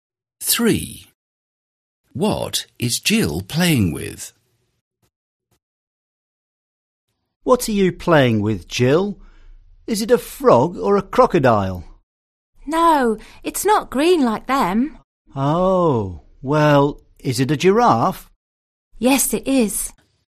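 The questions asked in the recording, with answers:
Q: What is Jill playing with?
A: A giraffe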